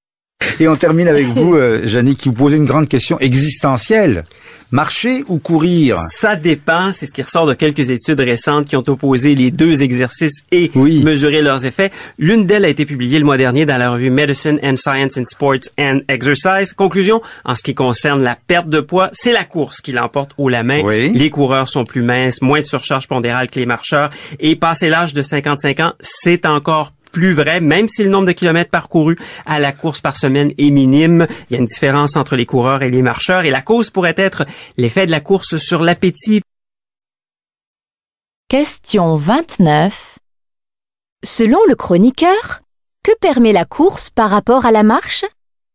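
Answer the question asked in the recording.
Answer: De perdre davantage de poids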